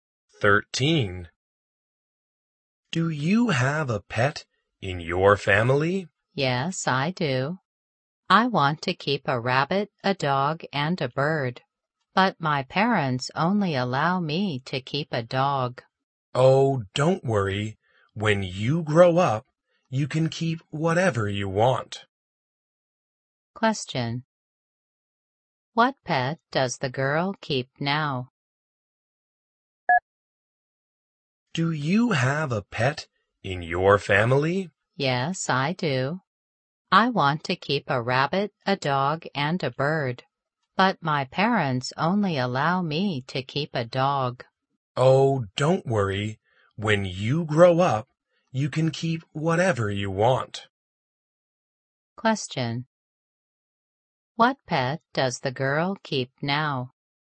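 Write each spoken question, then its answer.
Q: What pet does the girl keep now?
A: A dog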